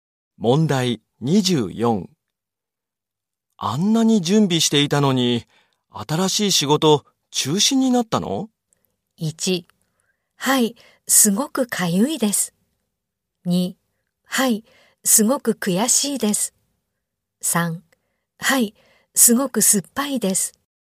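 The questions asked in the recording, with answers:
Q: あんなに準備していたのに、新しい仕事中止になったの?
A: 2: はい、すごく悔しいです。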